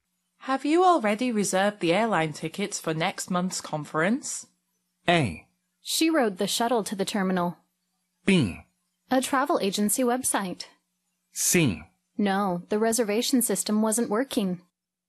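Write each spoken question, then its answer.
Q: Have you already reserved the airline tickets for next month's conference?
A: C: No, the reservation system wasn't working.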